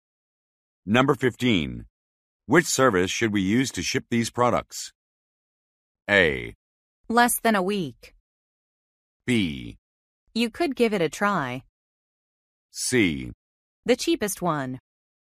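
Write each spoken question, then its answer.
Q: Which service should we use to ship these products?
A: C: The cheapest one.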